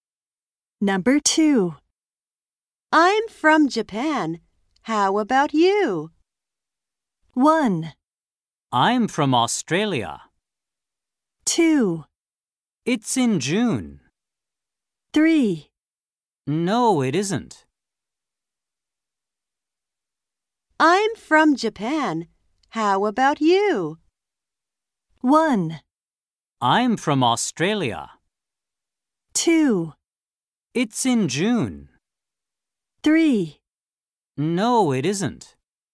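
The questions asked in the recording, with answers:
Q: I'm from Japan. How about you?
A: 1: I'm from Australia.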